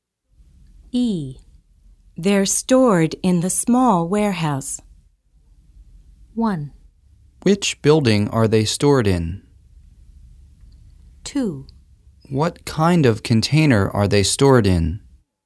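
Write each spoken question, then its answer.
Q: They're stored in the small warehouse.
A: 1: Which building are they stored in?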